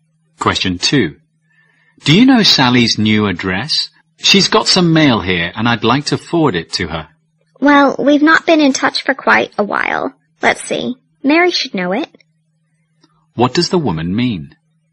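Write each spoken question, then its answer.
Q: What does the woman mean?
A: She doesn't know Sally's address; Mary may know it.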